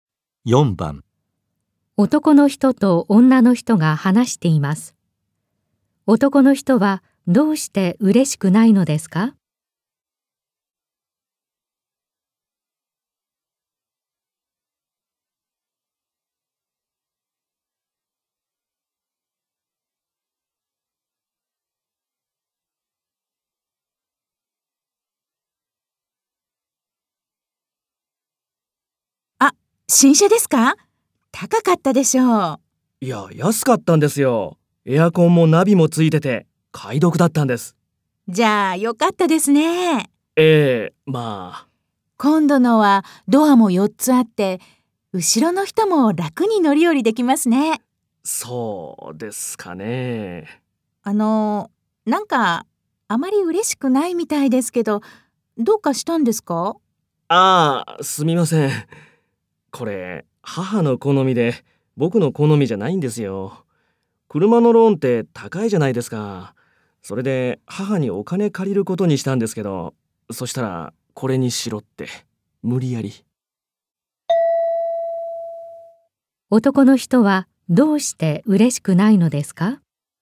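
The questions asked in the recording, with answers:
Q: 男の人は、どうして嬉しくないのですか?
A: 車が母の好みで、自分の好みではないから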